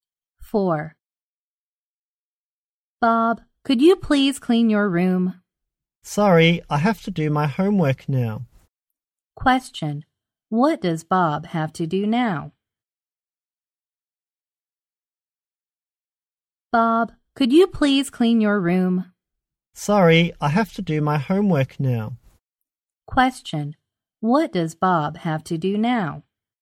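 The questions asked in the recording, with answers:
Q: What does Bob have to do now?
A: Do his homework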